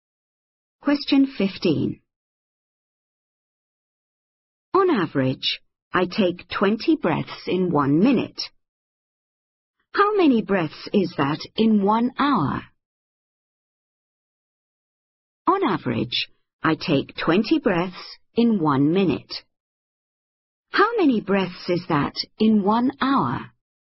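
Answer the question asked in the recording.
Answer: 1200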